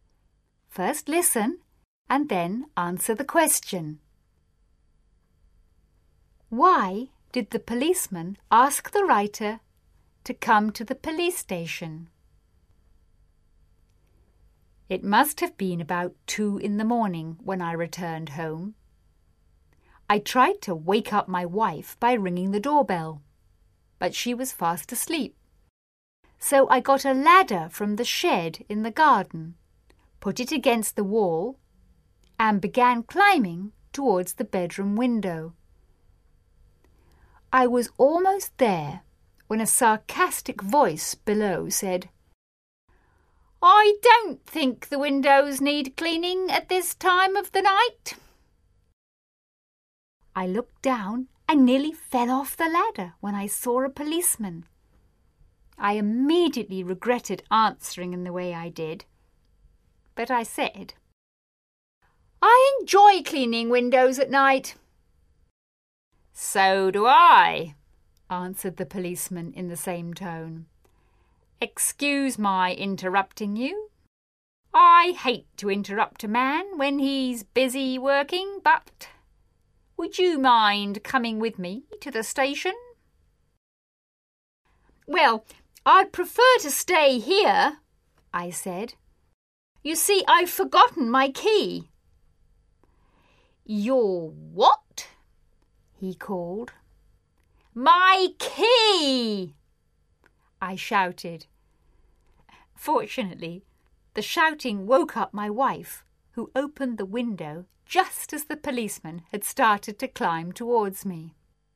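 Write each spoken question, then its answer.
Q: Why did the policeman ask the writer to come to the police station?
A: Because he saw him climbing a ladder to a window at 2 a.m. and thought he was a burglar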